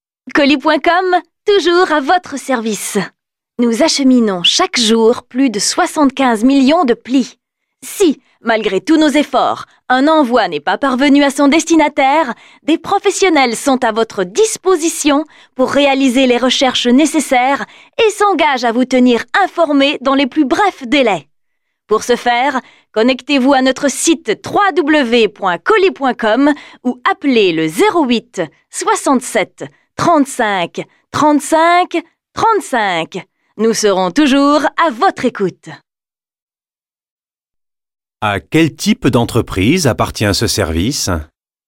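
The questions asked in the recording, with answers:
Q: À quel type d'entreprise appartient ce service ?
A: Une entreprise de livraison de colis et de courrier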